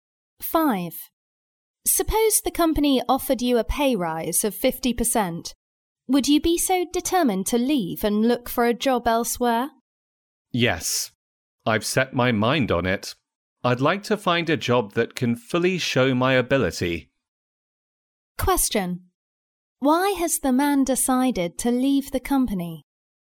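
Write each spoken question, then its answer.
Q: Why has the man decided to leave the company?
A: He wants a job that can fully show his ability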